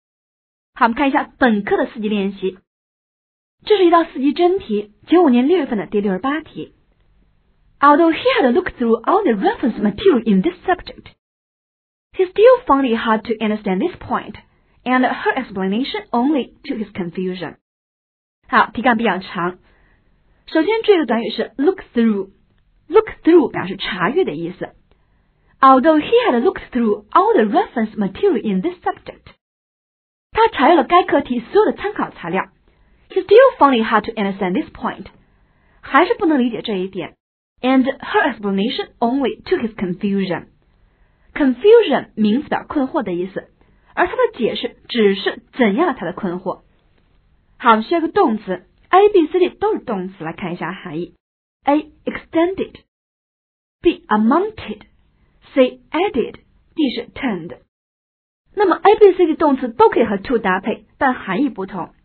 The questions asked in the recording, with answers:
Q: Although he had looked through all the reference material in this subject, he still found it hard to understand this point and her explanation only to his confusion.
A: 答案 C 符合题意